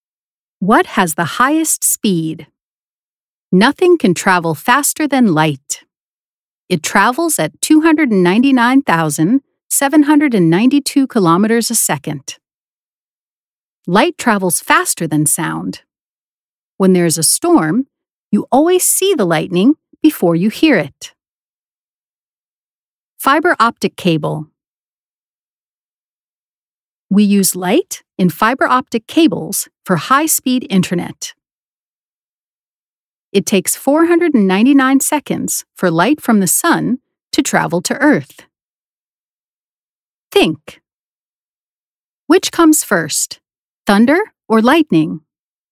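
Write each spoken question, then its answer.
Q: Which comes first, thunder or lightning?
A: Lightning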